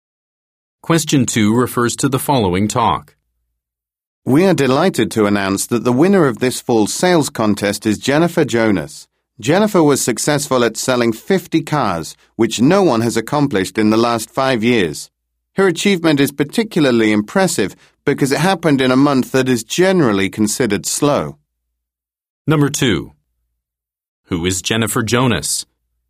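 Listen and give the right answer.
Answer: A car salesperson who won the sales contest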